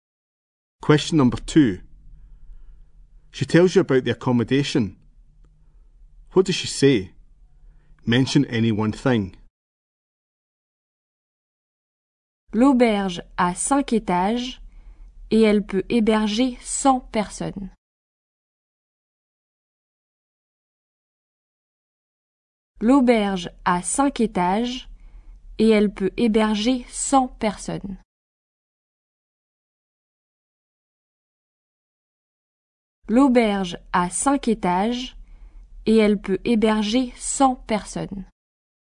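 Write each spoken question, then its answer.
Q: What does she say? Mention any one thing.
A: The hostel has 5 floors / it can hold 100 people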